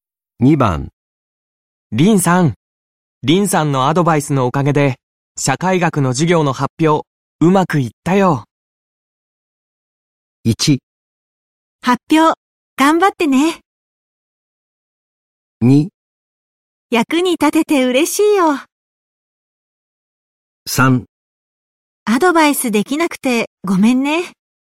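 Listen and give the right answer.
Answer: 2: 役に立てて嬉しいよ。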